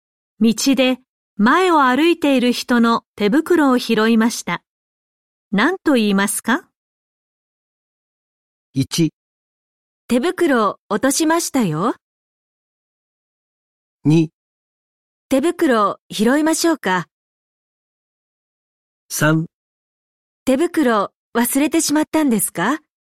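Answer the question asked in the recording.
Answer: 1: 手袋を落としましたよ。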